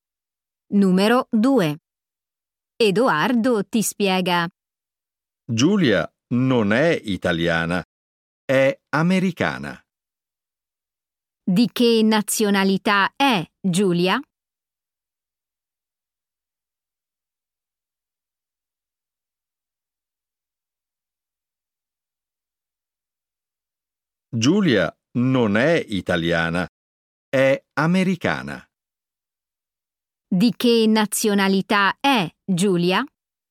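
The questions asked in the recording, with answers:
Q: Di che nazionalità è Giulia?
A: americana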